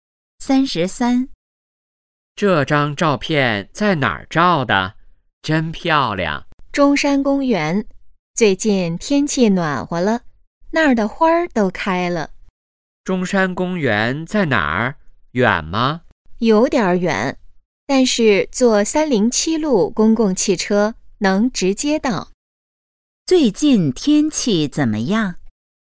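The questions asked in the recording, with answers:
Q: 最近天气怎么样?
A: 暖和了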